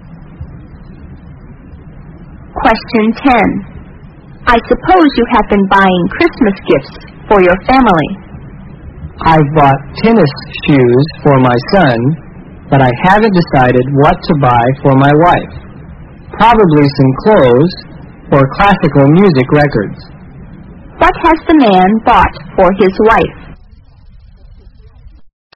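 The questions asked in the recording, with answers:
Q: What has the man bought for his wife?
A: Nothing yet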